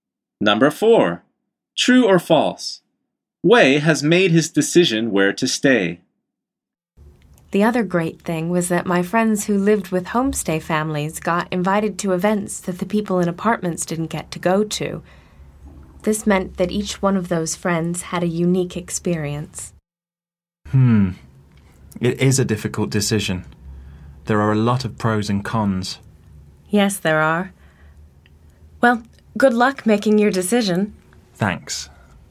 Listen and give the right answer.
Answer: The answer is false.